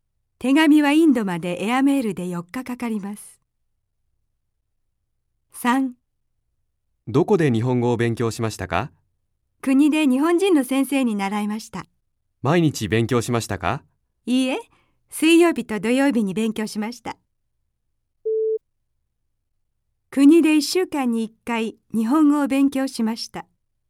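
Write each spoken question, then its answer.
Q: 国で1週間に1回日本語を勉強しました。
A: いいえ(水曜日と土曜日、1週間に2回)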